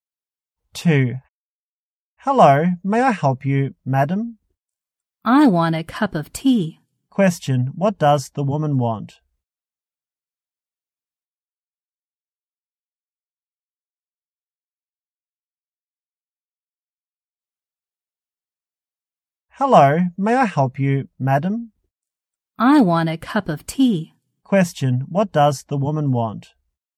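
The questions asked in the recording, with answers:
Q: what does the woman want?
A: A cup of tea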